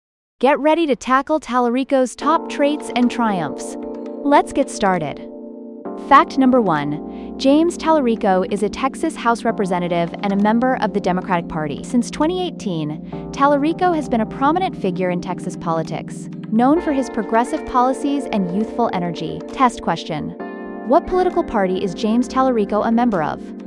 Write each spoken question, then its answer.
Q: What political party is James Tallarico a member of?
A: Correct answer, Democratic Party.